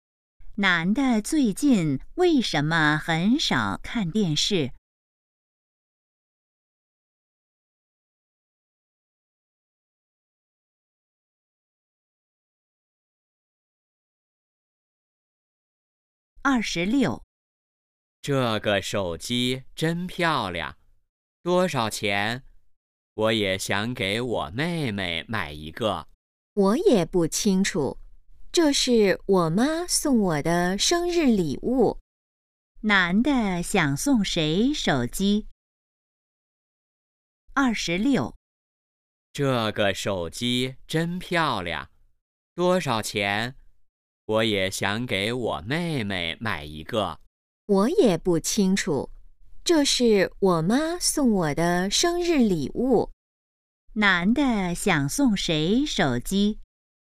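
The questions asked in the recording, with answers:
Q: 男的想送谁手机?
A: 妹妹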